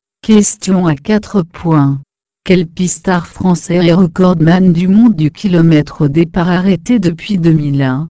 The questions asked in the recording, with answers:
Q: Quel pistard français est recordman du monde du kilomètre au départ arrêté depuis 2001?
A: Réponse. Arnaud Tournant.